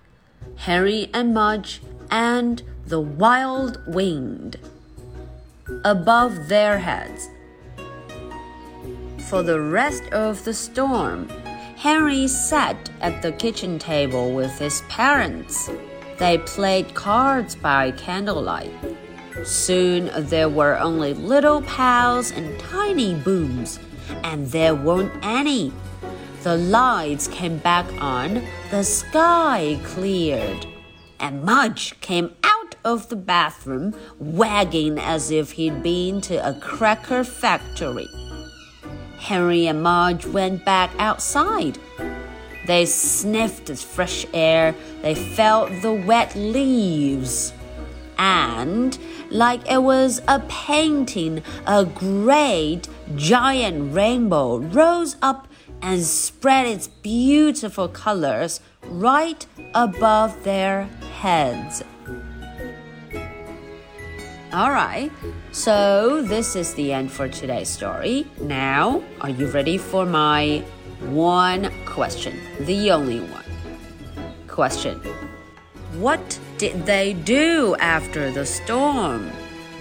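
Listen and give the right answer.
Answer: They went back outside, sniffed the fresh air, felt the wet leaves and saw a rainbow.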